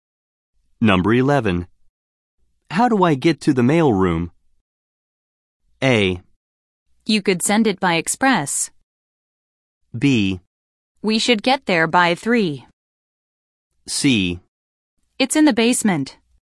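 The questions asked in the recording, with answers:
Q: How do I get to the mail room?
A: C: It's in the basement.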